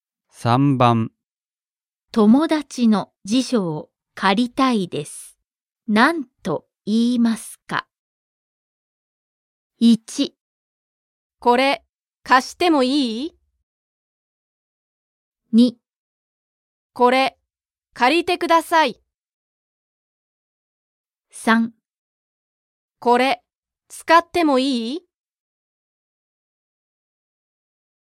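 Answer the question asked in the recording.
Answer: 3: これ使ってもいい?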